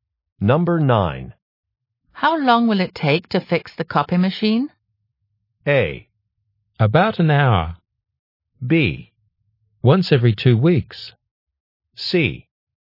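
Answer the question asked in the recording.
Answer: A: About an hour.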